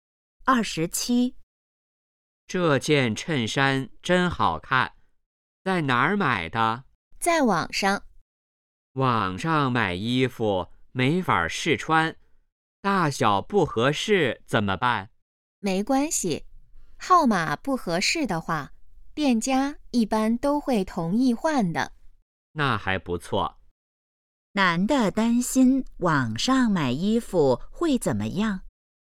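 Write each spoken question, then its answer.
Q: 男的担心网上买衣服会怎么样?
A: 大小不合适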